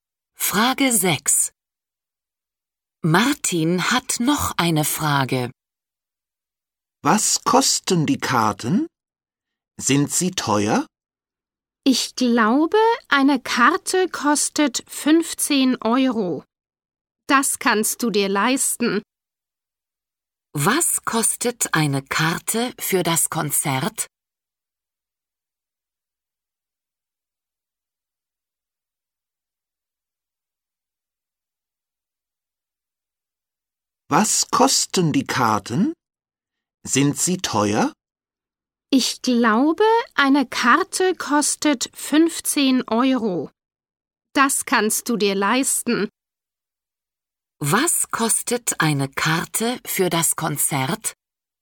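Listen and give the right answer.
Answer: 15 Euro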